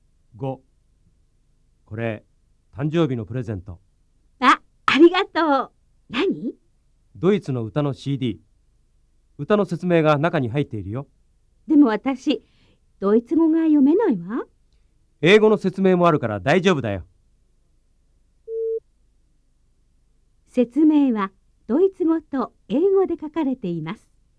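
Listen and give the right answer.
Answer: ○(正しい)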